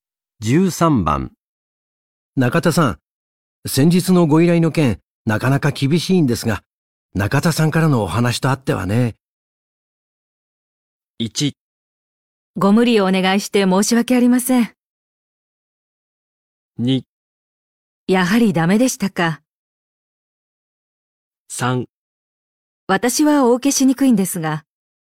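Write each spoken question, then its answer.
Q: 中田さん、先日のご依頼の件、なかなか厳しいんですが、中田さんからのお話とあってはね。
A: 1: ご無理をお願いして申し訳ありません。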